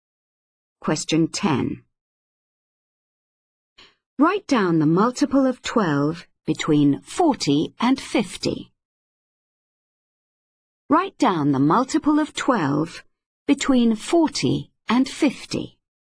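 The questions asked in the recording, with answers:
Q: Write down the multiple of 12 between 40 and 50.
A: 48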